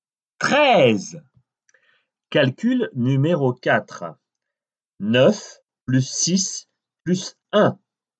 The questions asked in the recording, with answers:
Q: 9 plus 6 plus 1.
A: Seize.